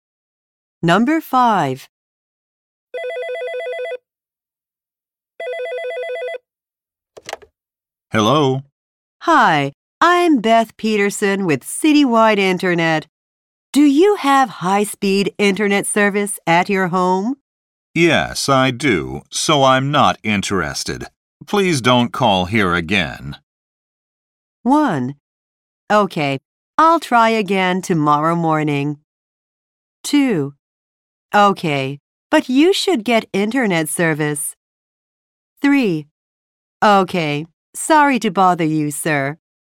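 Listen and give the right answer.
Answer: 3: Okay, sorry to bother you, sir.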